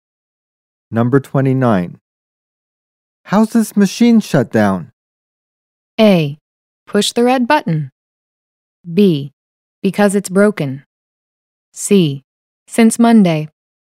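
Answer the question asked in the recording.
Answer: A: Push the red button.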